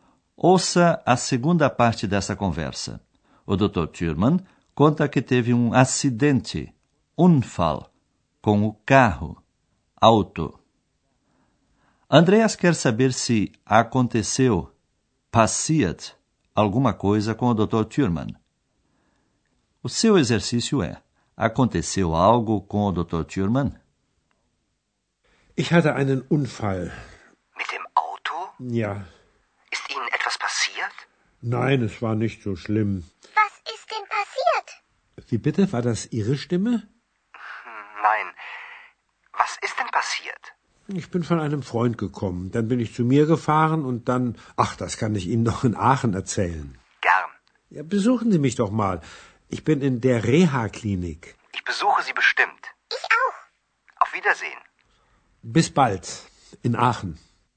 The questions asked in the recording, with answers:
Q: Aconteceu algo com o Dr. Thurman?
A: Pelo menos não aconteceu nada de grave com o Dr.